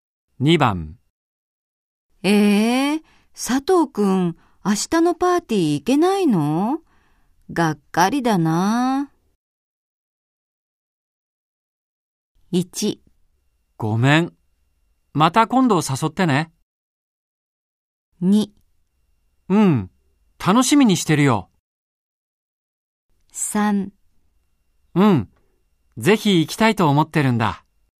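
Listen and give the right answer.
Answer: 1: ごめん、また今度誘ってね。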